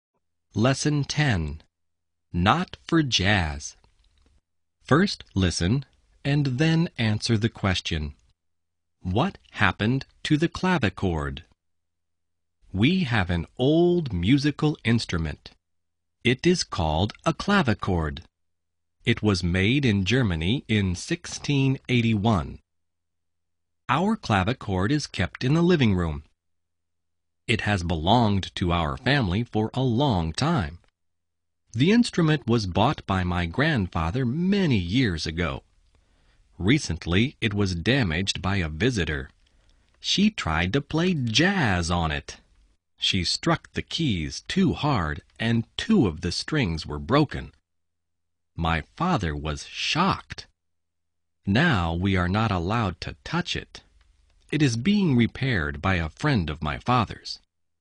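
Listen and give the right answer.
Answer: It was damaged by a visitor who played jazz on it too hard and broke two strings; now it is being repaired.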